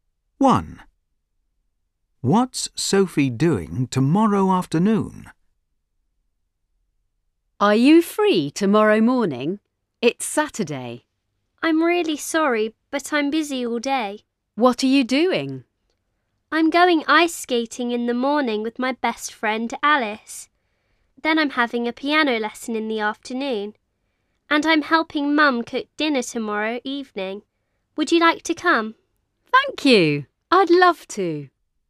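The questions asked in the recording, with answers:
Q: What's Sophie doing tomorrow afternoon?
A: having a piano lesson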